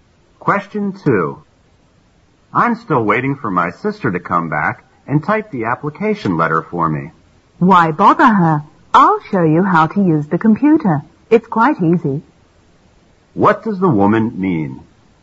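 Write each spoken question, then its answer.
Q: What does the woman mean?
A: She will show him how to use the computer to type the letter himself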